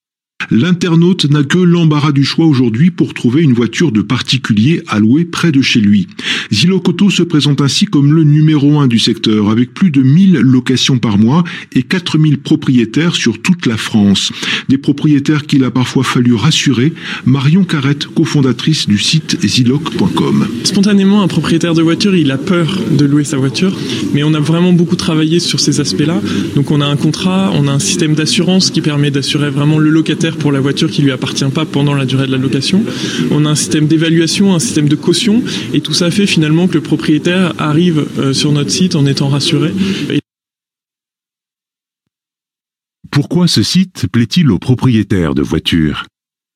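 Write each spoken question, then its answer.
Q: Pourquoi ce site plaît-il aux propriétaires de voitures ?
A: Parce qu'ils sont rassurés : contrat, assurance, évaluation et caution les protègent.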